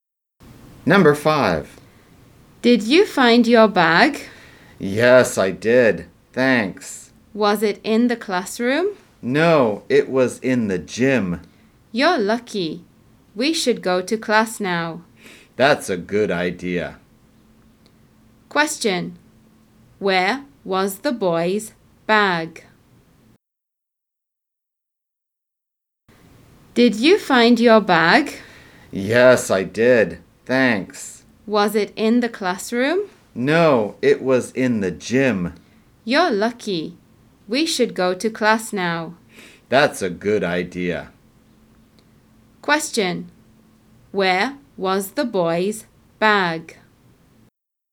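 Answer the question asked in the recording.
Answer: In the gym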